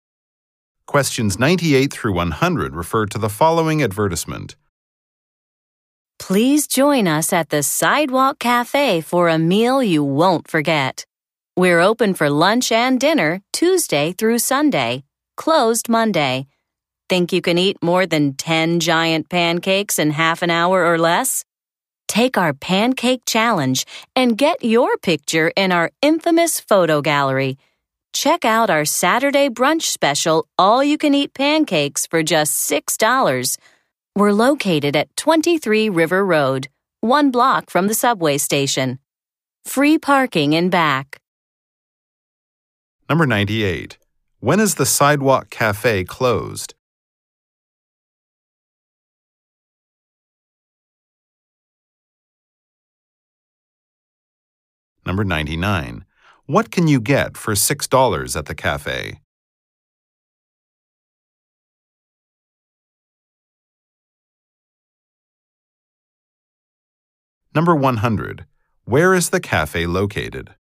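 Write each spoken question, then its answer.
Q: When is the Sidewalk Cafe closed?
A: Monday

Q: What can you get for $6 at the cafe?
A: All-you-can-eat pancakes at Saturday brunch

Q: Where is the cafe located?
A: 23 River Road, one block from the subway station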